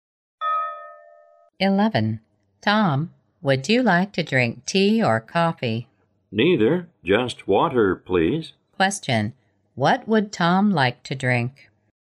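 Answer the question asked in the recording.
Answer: Water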